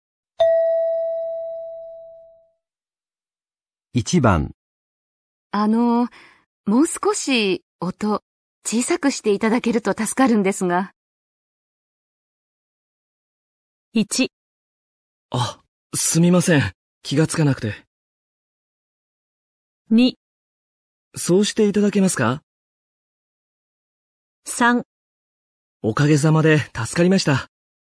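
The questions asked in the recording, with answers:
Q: もう少し音小さくしていただけると助かるんですが。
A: 1: あ、すみません。気がつかなくて。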